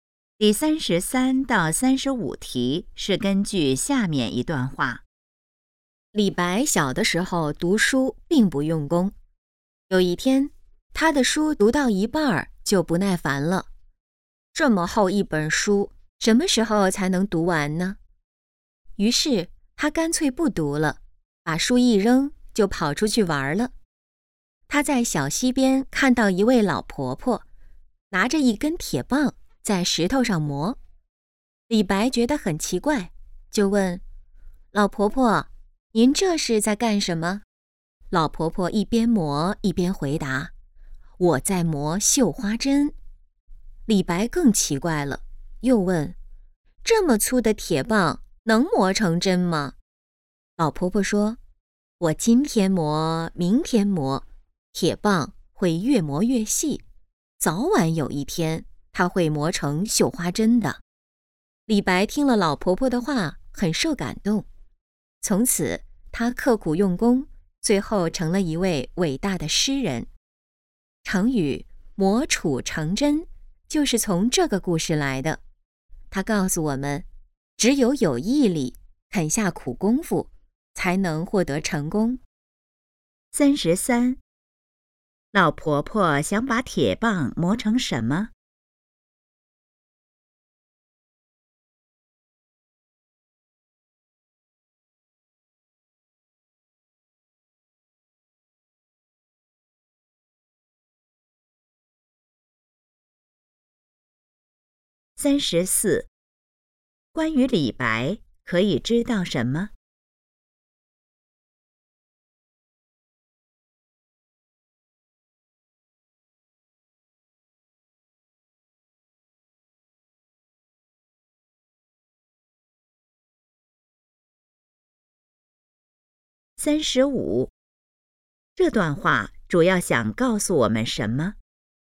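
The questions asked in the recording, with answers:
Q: 老婆婆想把铁棒磨成什么?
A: 绣花针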